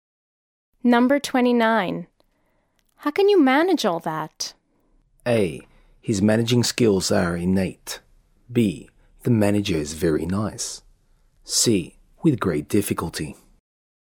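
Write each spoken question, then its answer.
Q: How can you manage all that?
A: C: With great difficulty.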